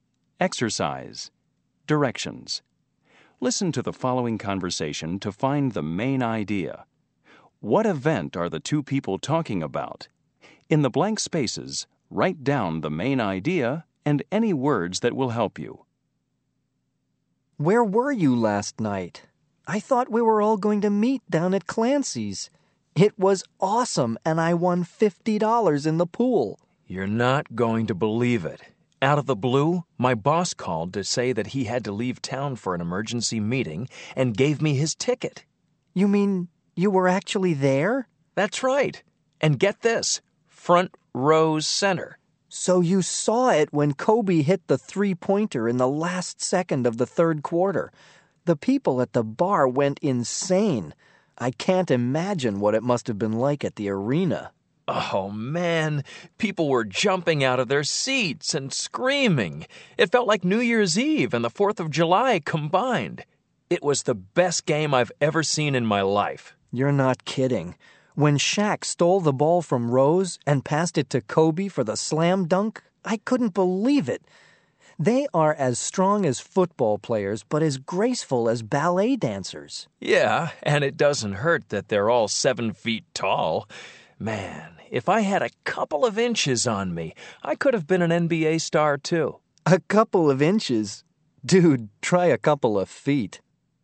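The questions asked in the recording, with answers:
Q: What event are the two people talking about?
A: A basketball game (NBA game with Kobe and Shaq)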